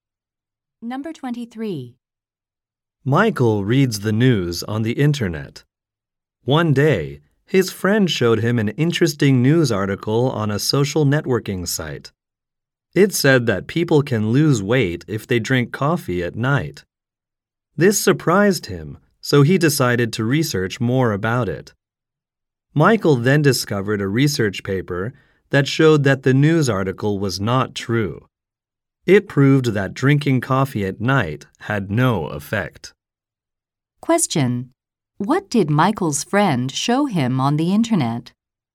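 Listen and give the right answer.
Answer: An article saying drinking coffee at night helps you lose weight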